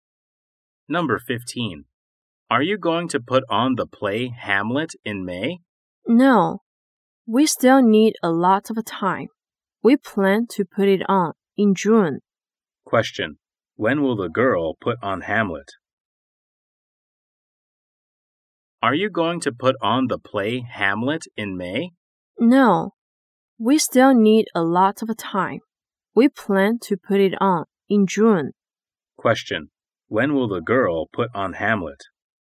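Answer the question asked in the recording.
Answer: In June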